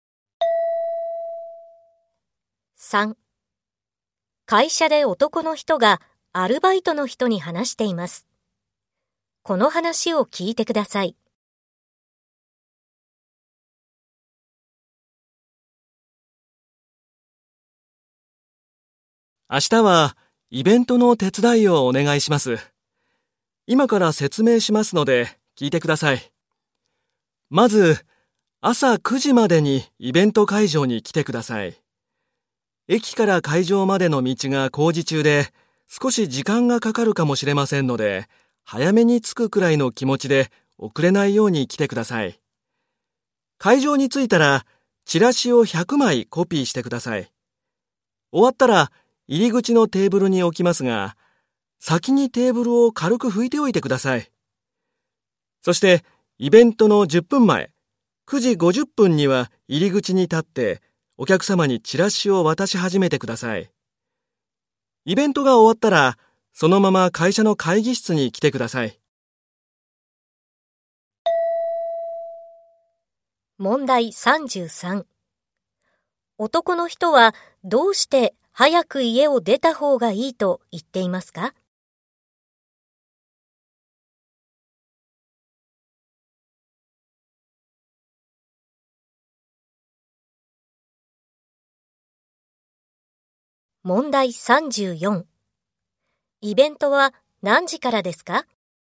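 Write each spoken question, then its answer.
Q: 男の人はどうして早く家を出た方がいいと言っていますか?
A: 駅から会場までの道が工事中で時間がかかるかもしれないから

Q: イベントは何時からですか?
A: 10時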